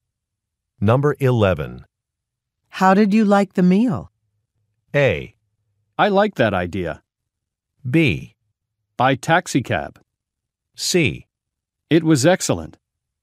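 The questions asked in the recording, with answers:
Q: How did you like the meal?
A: C: It was excellent.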